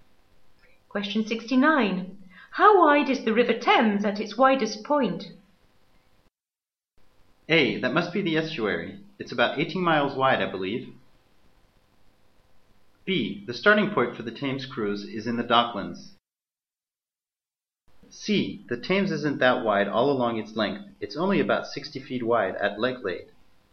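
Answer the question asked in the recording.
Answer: A: That must be the estuary. It's about 18 miles wide, I believe.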